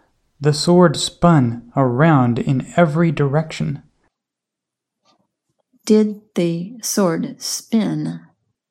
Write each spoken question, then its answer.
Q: Did the sword spin?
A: Yes, the sword spun around in every direction.